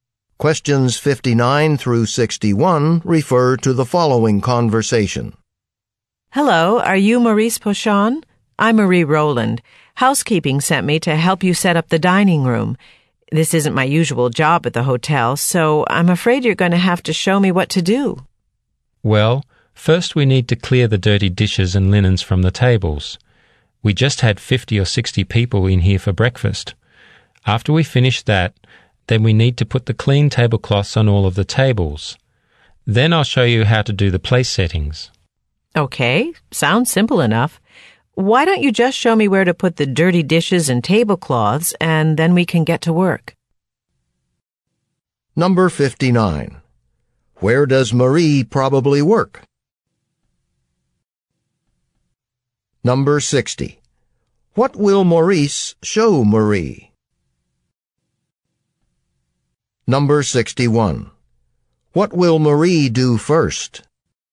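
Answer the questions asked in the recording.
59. At a hotel (housekeeping)
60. How to do the place settings
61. Clear the dirty dishes and linens from the tables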